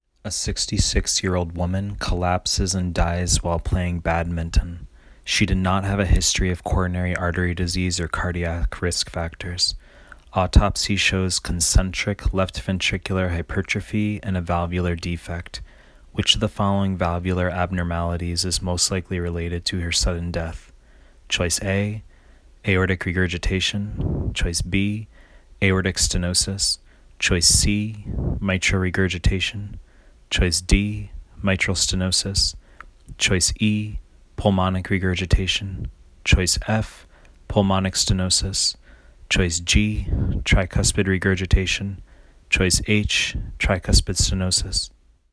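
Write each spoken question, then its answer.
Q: Which of the following valvular abnormalities is most likely related to her sudden death?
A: B: aortic stenosis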